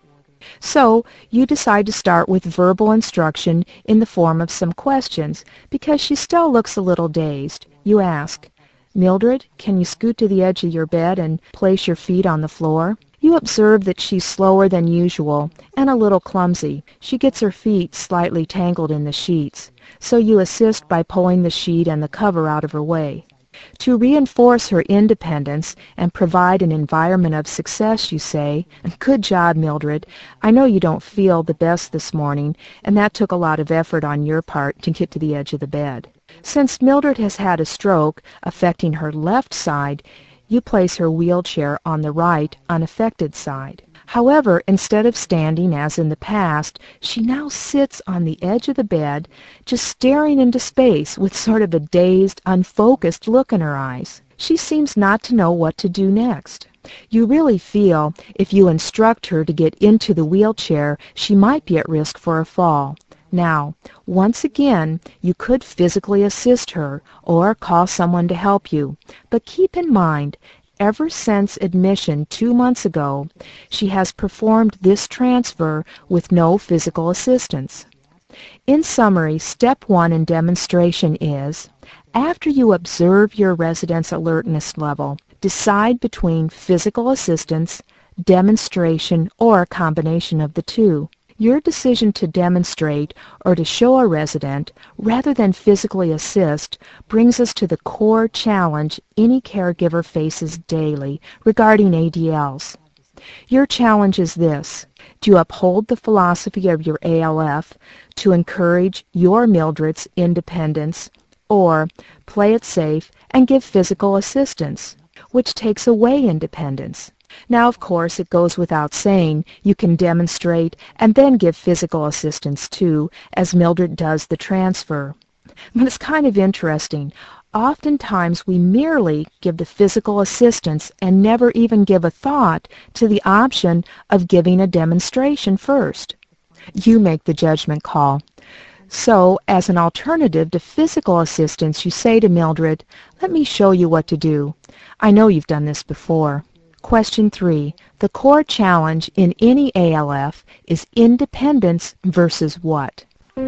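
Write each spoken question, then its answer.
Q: The core challenge in any ALF is independence versus what?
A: Safety (giving physical assistance)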